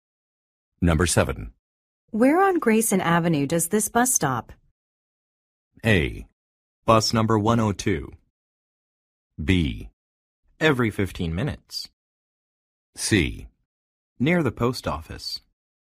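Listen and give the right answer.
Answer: C: Near the post office.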